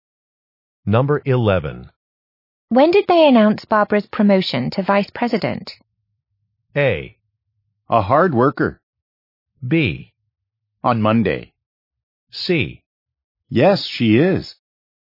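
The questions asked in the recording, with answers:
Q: When did they announce Barbara's promotion to vice president?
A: B: On Monday.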